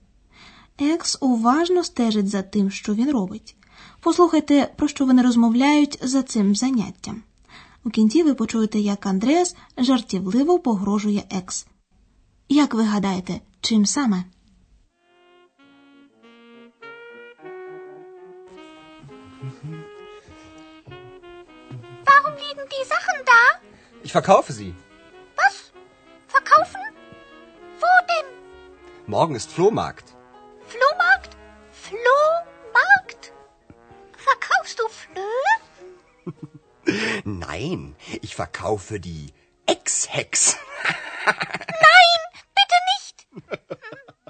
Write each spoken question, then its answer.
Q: Як ви гадаєте, чим саме?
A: Андреас, звичайно, жартома, погрожує екс, що разом зі старими речами продасть на блошиному ринку її.